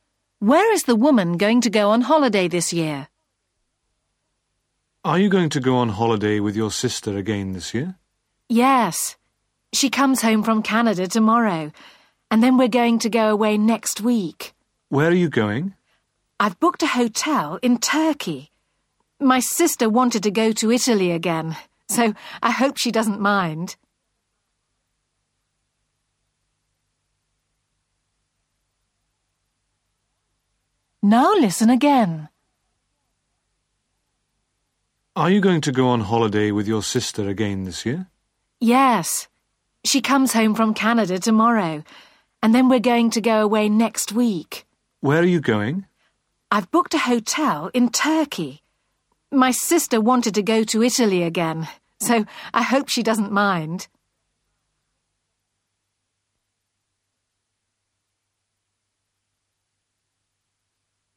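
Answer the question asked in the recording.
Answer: Turkey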